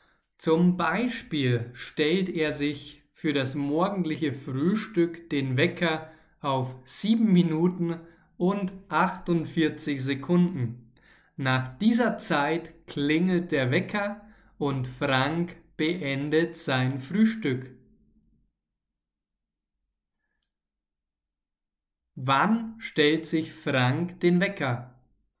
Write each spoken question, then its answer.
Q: Wann stellt sich Frank den Wecker?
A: Beim Frühstück.